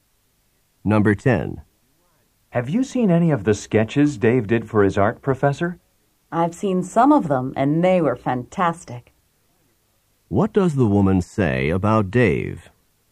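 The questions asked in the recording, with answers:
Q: What does the woman say about Dave?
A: His sketches are fantastic.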